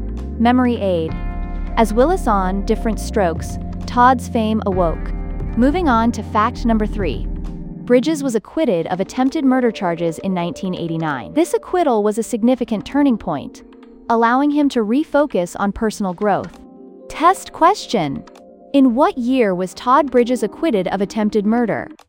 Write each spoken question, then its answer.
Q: in what year was Todd Bridges acquitted of attempted murder?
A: 1989.